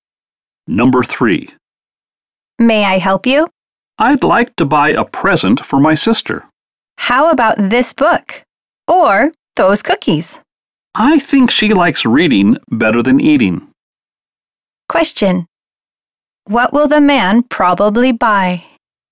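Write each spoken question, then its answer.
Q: What will the man probably buy?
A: A book.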